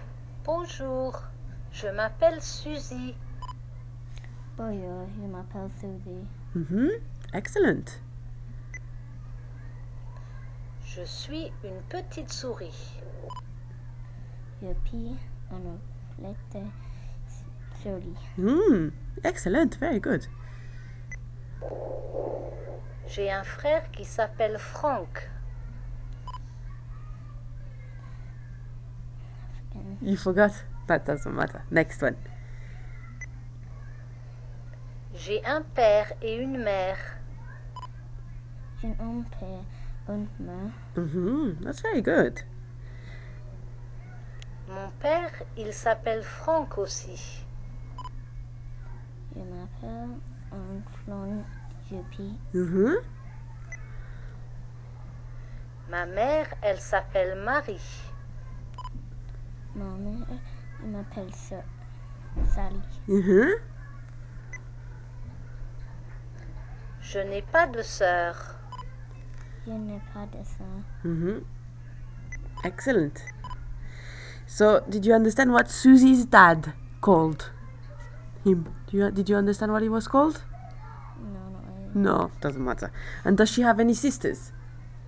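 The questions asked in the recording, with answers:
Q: So, did you understand what Susie's dad called him?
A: Franck

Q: And does she have any sisters?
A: No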